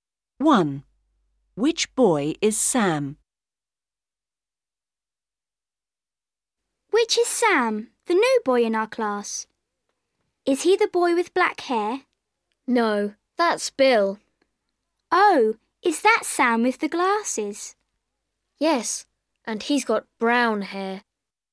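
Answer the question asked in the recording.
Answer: The boy with glasses and brown hair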